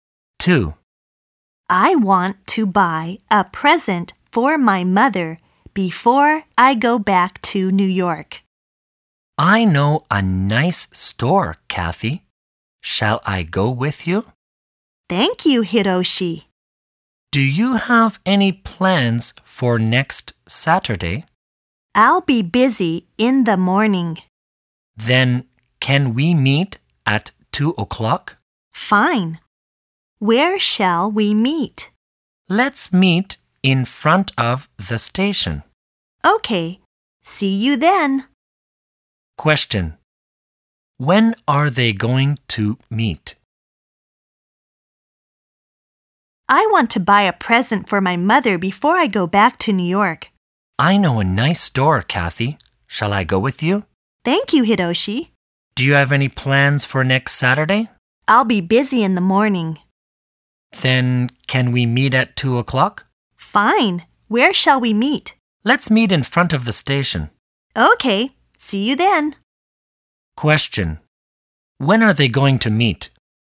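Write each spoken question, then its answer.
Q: When are they going to meet?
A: At 2 o'clock next Saturday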